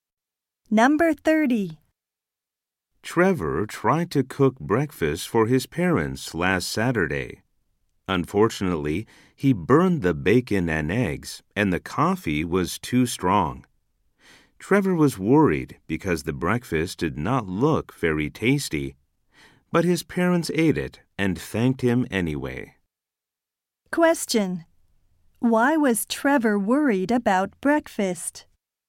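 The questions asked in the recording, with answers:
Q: Why was Trevor worried about breakfast?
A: It did not look very tasty.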